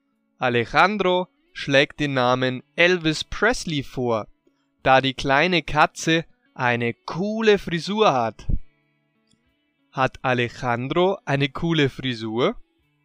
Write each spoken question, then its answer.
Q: Hat Alejandro eine coole Frisur?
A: Nein, er hat keine coole Frisur, sondern seine kleine Katze.